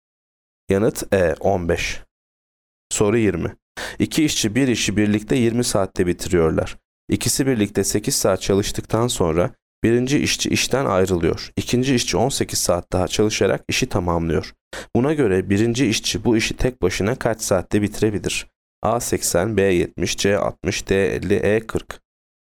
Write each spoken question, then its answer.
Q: Buna göre birinci işçi bu işi tek başına kaç saatte bitirebilir?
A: Yanıt C 60.